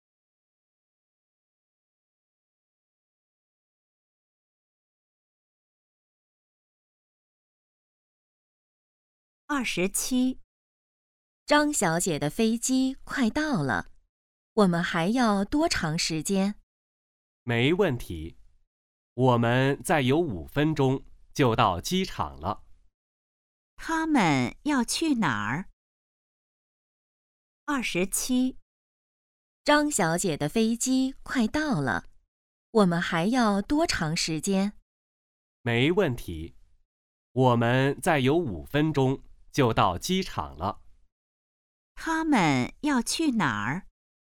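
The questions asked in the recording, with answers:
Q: 他们要去哪儿?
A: 机场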